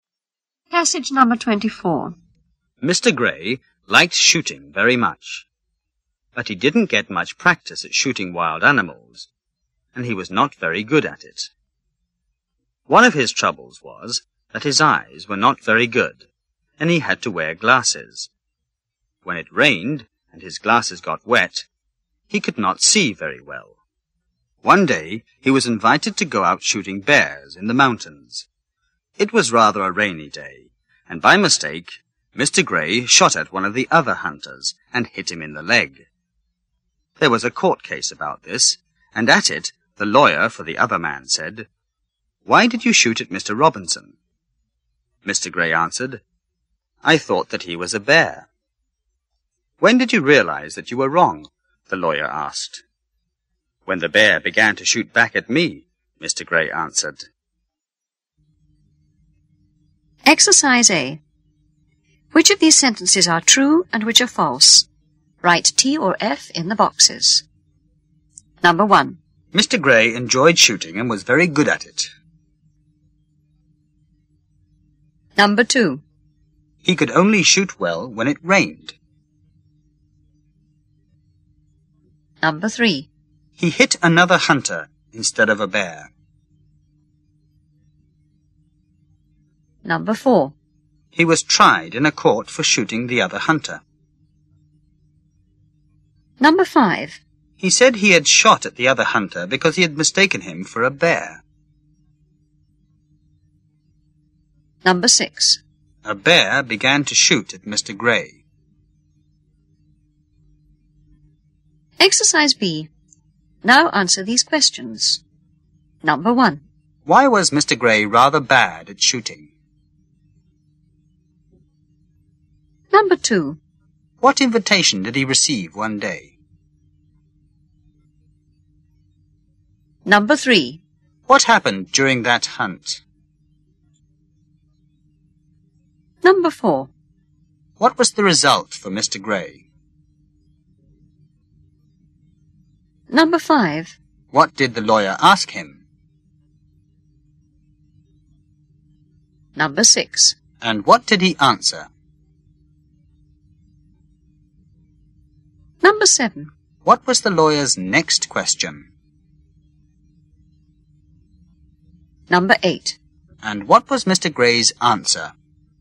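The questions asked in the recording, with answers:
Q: Mr. Gray enjoyed shooting and was very good at it.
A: False

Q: He could only shoot well when it rained.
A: False

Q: He hit another hunter instead of a bear.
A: True

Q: He was tried in a court for shooting the other hunter.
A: True

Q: He said he had shot at the other hunter because he had mistaken him for a bear.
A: True

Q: A bear began to shoot at Mr. Gray.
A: False

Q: Why was Mr. Gray rather bad at shooting?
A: He didn't get much practice, and his eyes were not very good.

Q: What invitation did he receive one day?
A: To go out shooting bears in the mountains.

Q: What happened during that hunt?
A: He shot another hunter in the leg by mistake.

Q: What was the result for Mr. Gray?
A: There was a court case.

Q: What did the lawyer ask him?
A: Why did you shoot at Mr. Robinson?

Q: And what did he answer?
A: I thought that he was a bear.

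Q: What was the lawyer's next question?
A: When did you realize that you were wrong?

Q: And what was Mr. Gray's answer?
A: When the bear began to shoot back at me.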